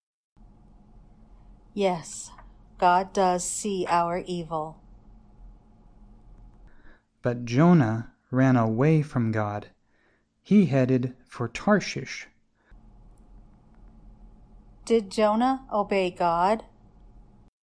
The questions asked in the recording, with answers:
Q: Did Jonah obey God?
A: No, Jonah ran away from God.